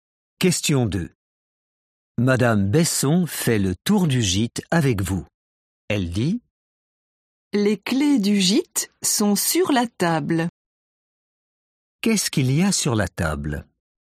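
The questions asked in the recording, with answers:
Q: Qu'est-ce qu'il y a sur la table?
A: les clés du gîte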